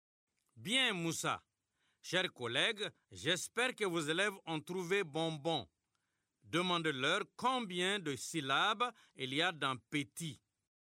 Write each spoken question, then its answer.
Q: Demandez-leur combien de syllabes il y a dans petit.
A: Il y a deux syllabes, monsieur.